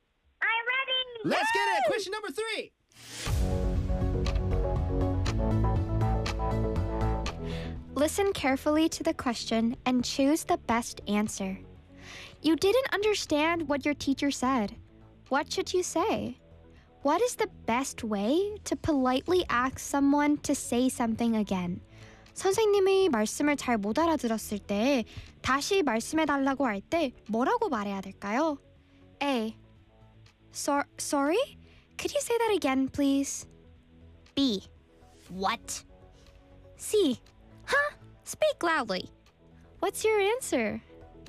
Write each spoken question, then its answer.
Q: What should you say? What is the best way to politely ask someone to say something again?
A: A. I'm sorry. Could you say that again, please?